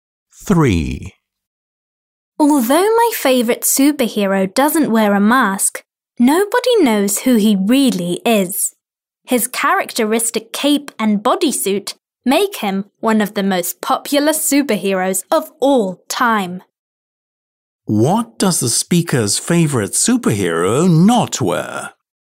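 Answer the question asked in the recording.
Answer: A mask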